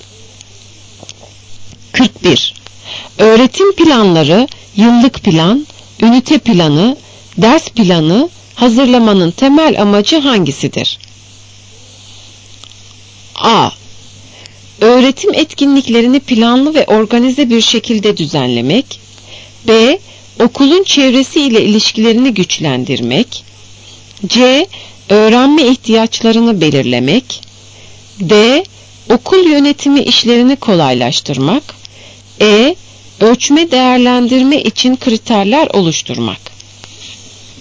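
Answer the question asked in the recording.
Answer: A: Öğretim etkinliklerini planlı ve organize bir şekilde düzenlemek.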